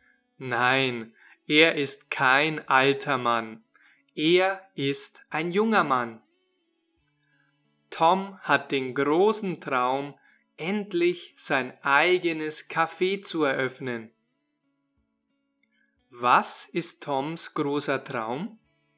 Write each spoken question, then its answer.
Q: Was ist Toms großer Traum?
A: sein eigenes Café zu eröffnen.